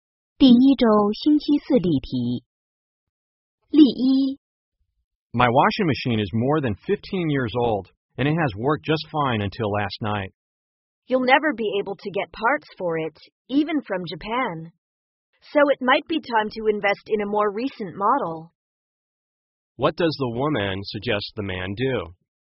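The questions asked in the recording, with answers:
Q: What does the woman suggest the man do?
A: Buy a new washing machine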